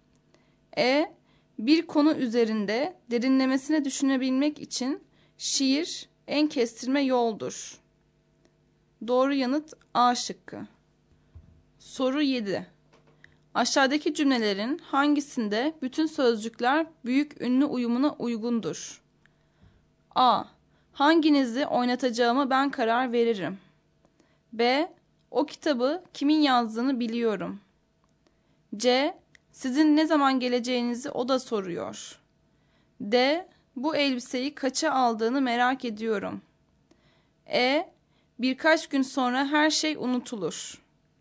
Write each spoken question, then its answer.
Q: Aşağıdaki cümlelerin hangisinde bütün sözcükler büyük ünlü uyumuna uygundur?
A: Doğru yanıt C şıkkı.